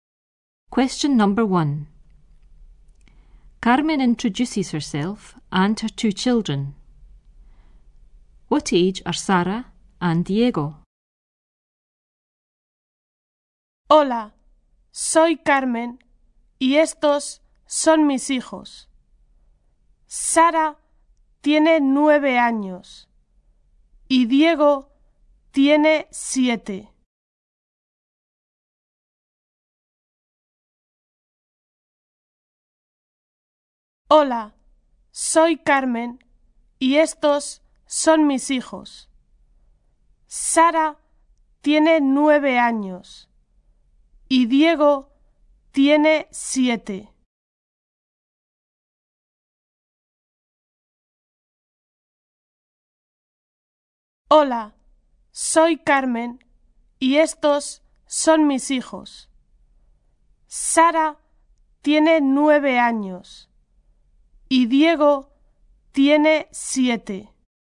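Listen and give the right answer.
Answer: Sara is 9 and Diego is 7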